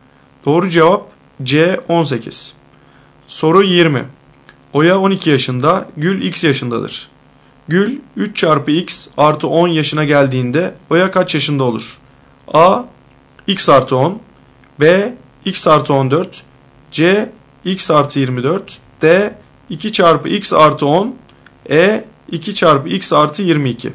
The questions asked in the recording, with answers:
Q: Gül 3 çarpı x artı 10 yaşına geldiğinde Oya kaç yaşında olur?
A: Doğru cevap 2 çarpı x artı 22.